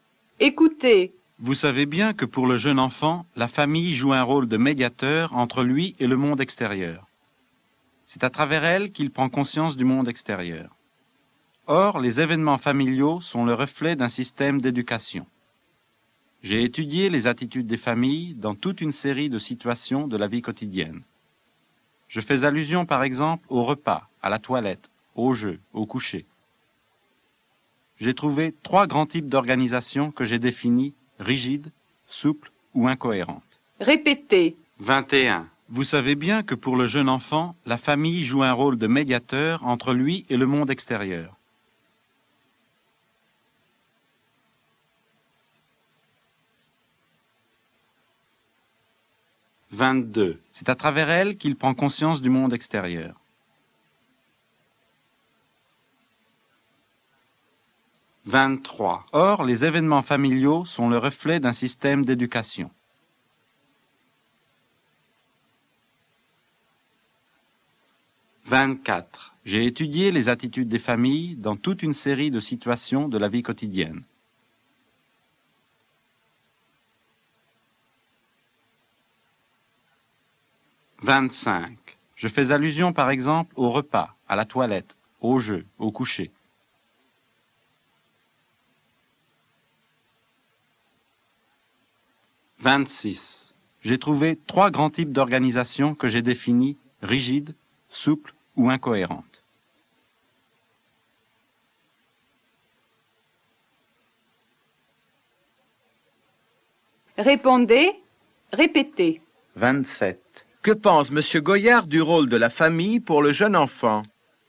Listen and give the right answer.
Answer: Il dit que, pour le jeune enfant, la famille joue un rôle de médiateur entre lui et le monde extérieur.